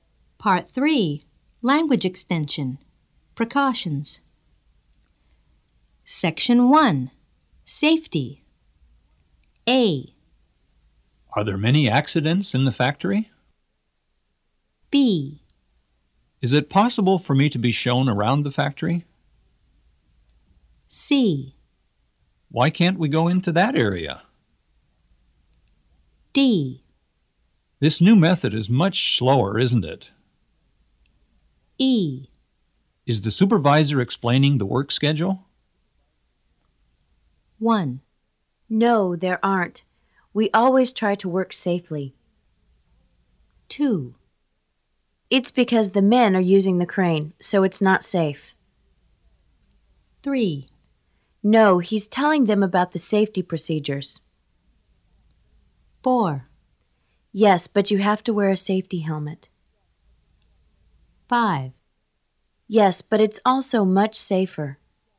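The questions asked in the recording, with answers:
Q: No, there aren't. We always try to work safely.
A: A: Are there many accidents in the factory?

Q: It's because the men are using the crane, so it's not safe.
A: C: Why can't we go into that area?

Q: No, he's telling them about the safety procedures.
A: E: Is the supervisor explaining the work schedule?

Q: Yes, but you have to wear a safety helmet.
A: B: Is it possible for me to be shown around the factory?

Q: Yes, but it's also much safer.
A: D: This new method is much slower, isn't it?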